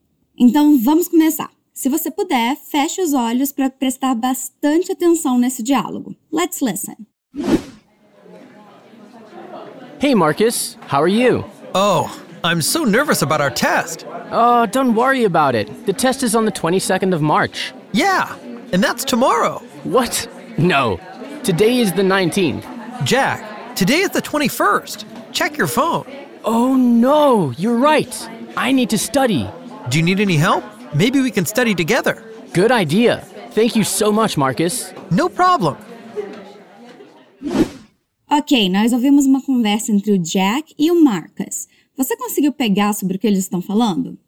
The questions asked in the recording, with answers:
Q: Você conseguiu pegar sobre o que eles estão falando?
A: Eles estão falando de uma prova que os dois vão ter.